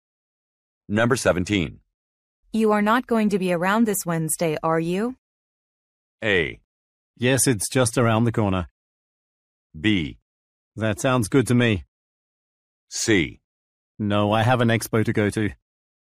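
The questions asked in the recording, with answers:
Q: You are not going to be around this Wednesday, are you?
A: C: No, I have an expo to go to.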